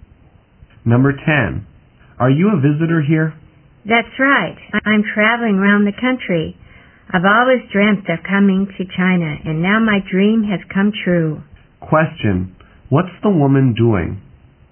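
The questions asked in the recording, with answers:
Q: What's the woman doing?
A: Traveling around China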